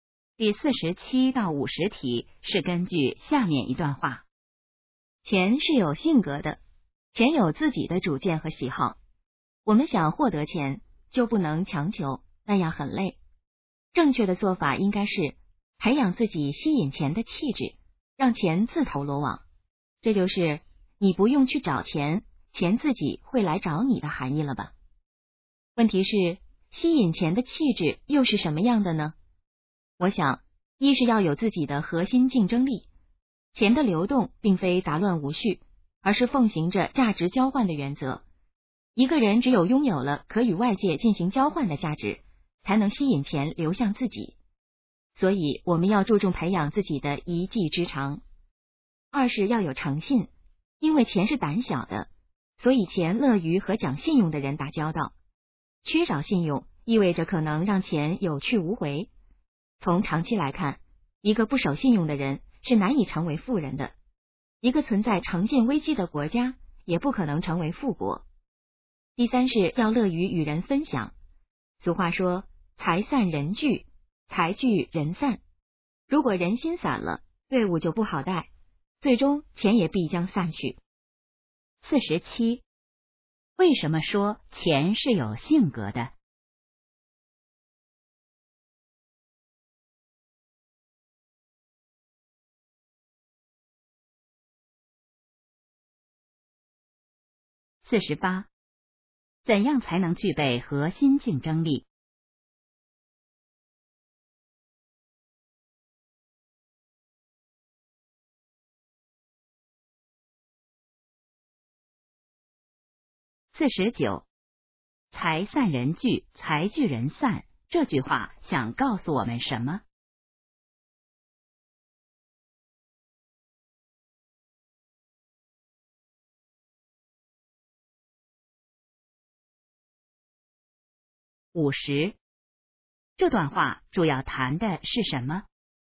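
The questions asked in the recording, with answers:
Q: 为什么说钱是有性格的?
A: 钱有自己的主见和喜好

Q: 怎样才能具备核心竞争力?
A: 培养自己的一技之长

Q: 财散人聚,财聚人散,这句话想告诉我们什么?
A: 要乐于与人分享

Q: 这段话主要谈的是什么?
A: 吸引钱的气质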